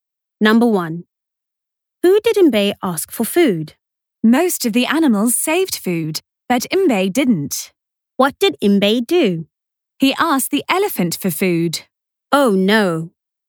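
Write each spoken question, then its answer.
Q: Who did Mbe ask for food?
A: the elephant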